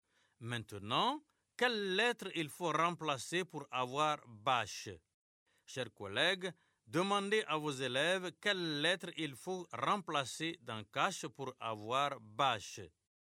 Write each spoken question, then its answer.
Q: Maintenant, quelle lettre il faut remplacer pour avoir bâche?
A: Monsieur, c'est la lettre C.